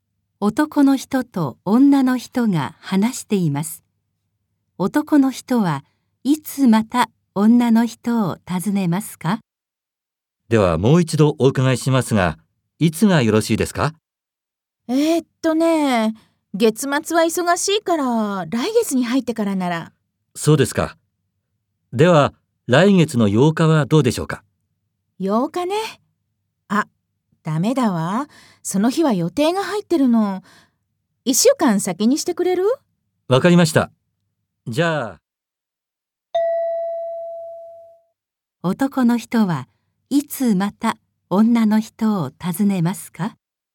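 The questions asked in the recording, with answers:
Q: 男の人はいつまた女の人を訪ねますか?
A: 来月の15日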